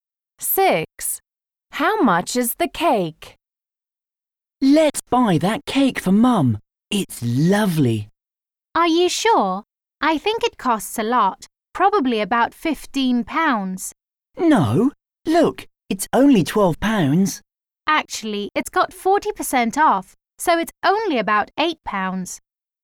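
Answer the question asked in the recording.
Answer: About £8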